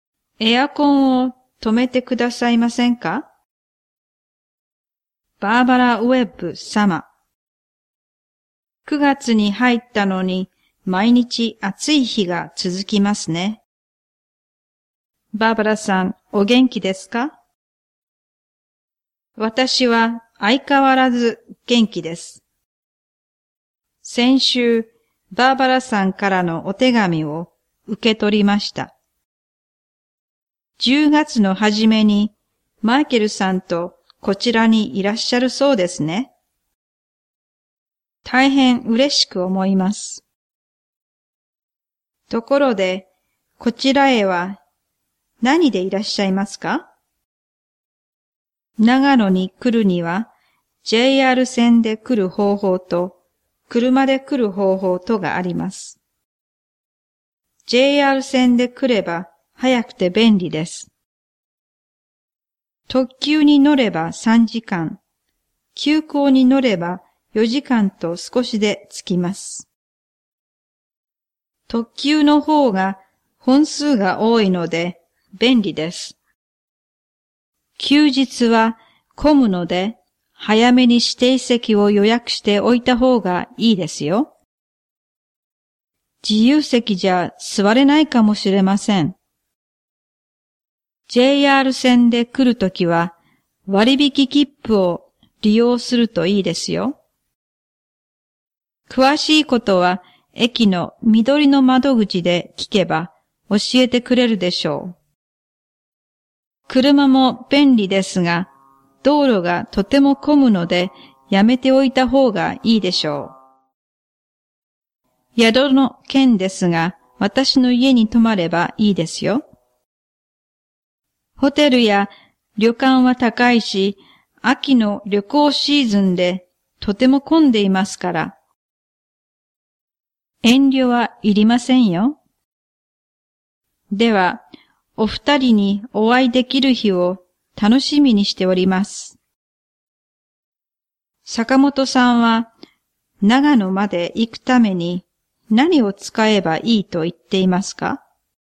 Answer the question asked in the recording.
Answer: JR 線の特急の指定席。